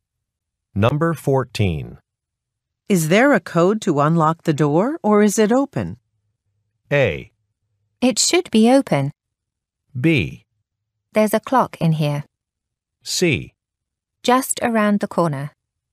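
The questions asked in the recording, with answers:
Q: Is there a code to unlock the door, or is it open?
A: A: It should be open.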